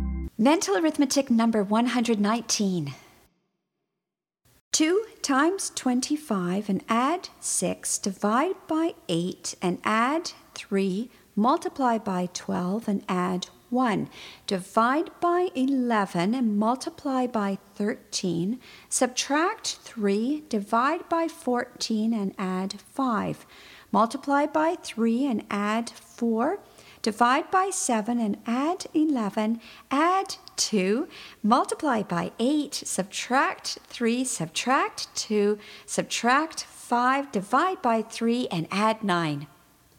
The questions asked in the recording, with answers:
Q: 2 times 25 and add 6, divide by 8 and add 3, multiply by 12 and add 1, divide by 11 and multiply by 13, subtract 3, divide by 14 and add 5, multiply by 3 and add 4, divide by 7 and add 11, add 2, multiply by 8, subtract 3, subtract 2, subtract 5, divide by 3 and add 9.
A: And the answer is 59.